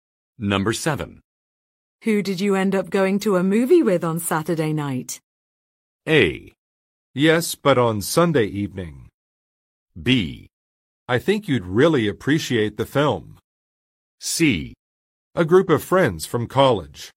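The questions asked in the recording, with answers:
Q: Who did you end up going to a movie with on Saturday night?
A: C: A group of friends from college.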